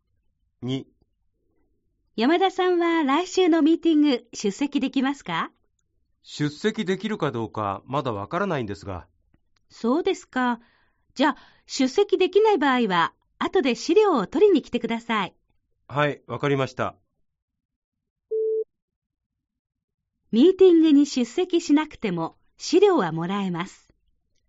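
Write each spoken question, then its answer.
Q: ミーティングに出席しなくても資料はもらえます。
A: ○(正しい)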